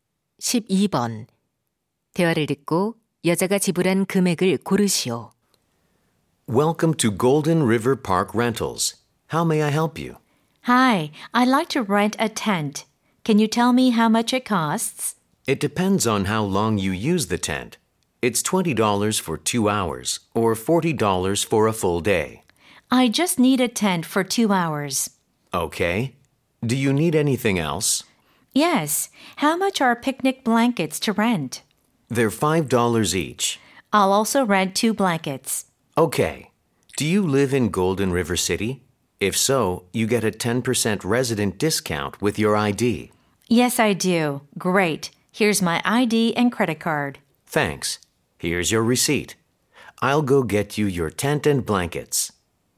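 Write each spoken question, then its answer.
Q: 대화를 듣고 여자가 지불한 금액을 고르시오.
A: $27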